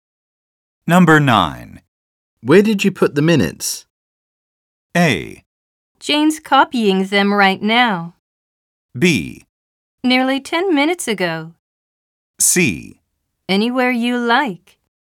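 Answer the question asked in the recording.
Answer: A: Jane's copying them right now.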